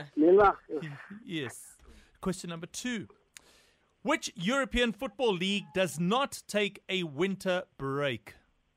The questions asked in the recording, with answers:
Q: Which European Football League does not take a winter break?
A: It is the Portugal League or Liga Portugal.